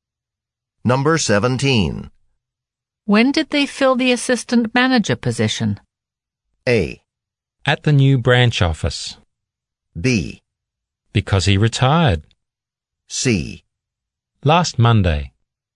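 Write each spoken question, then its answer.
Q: When did they fill the assistant manager position?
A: C: Last Monday.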